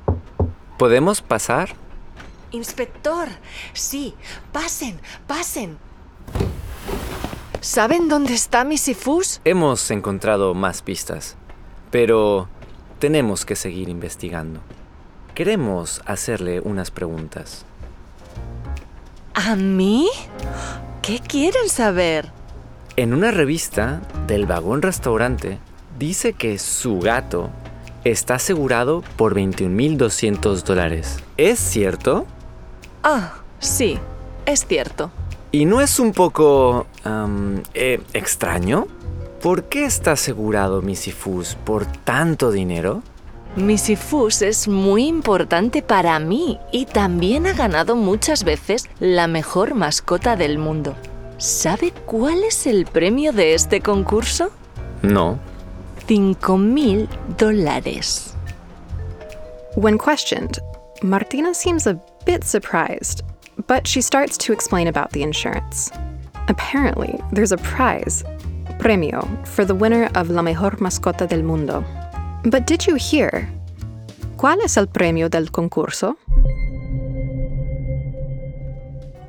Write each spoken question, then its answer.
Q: ¿Cuál es el premio del concurso?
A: Right. It's $5,000. $5,000.